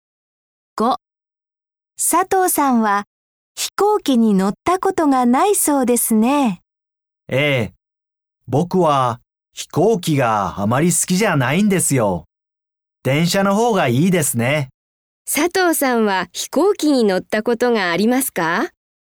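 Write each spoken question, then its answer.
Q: 佐藤さんは飛行機に乗ったことがありますか?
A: いいえ、ありません。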